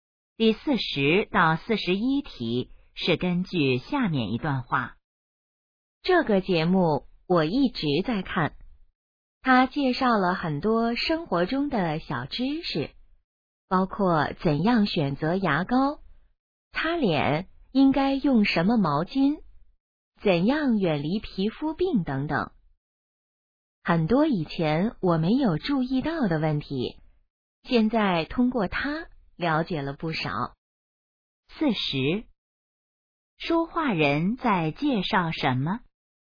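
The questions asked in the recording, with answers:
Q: 说话人在介绍什么?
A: 一个电视节目

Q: 说话人了解了哪方面的知识?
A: 生活中的小知识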